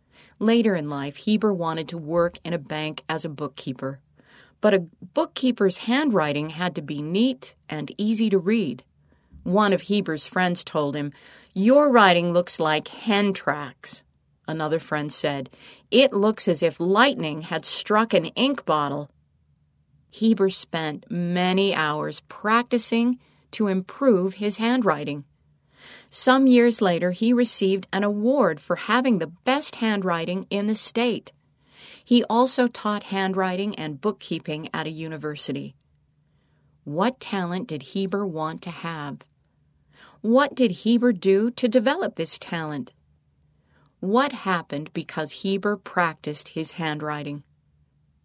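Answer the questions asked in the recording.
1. Neat handwriting
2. He spent many hours practicing his handwriting
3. He won an award for the best handwriting in the state and taught handwriting and bookkeeping at a university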